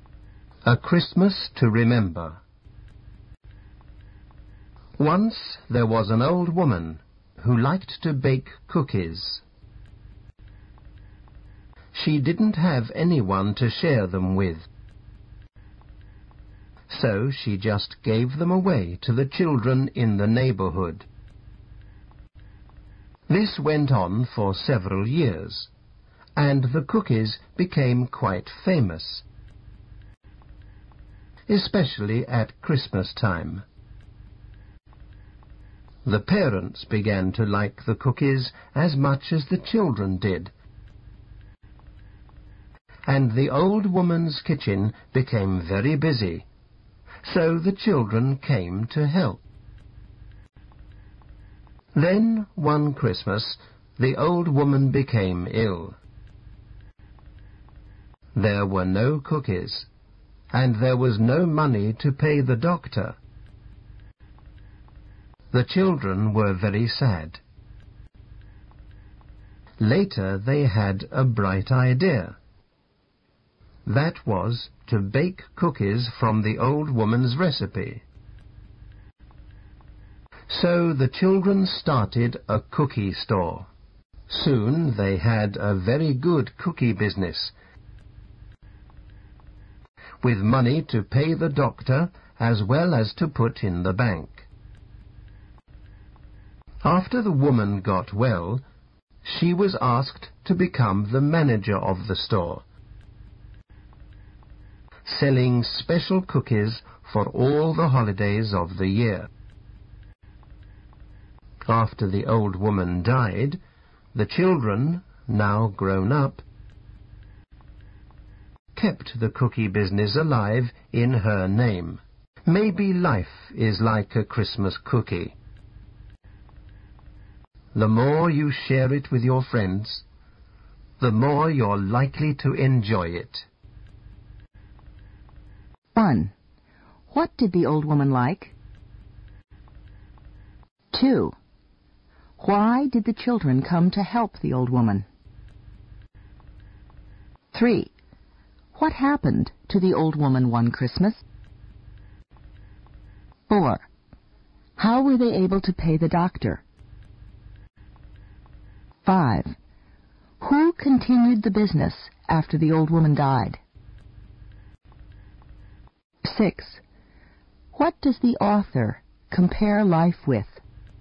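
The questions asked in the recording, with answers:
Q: What did the old woman like?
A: Baking cookies

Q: Why did the children come to help the old woman?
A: Her kitchen became very busy

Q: What happened to the old woman one Christmas?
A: She became ill

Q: How were they able to pay the doctor?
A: The children started a cookie store

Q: Who continued the business after the old woman died?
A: The children, now grown up

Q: What does the author compare life with?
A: A Christmas cookie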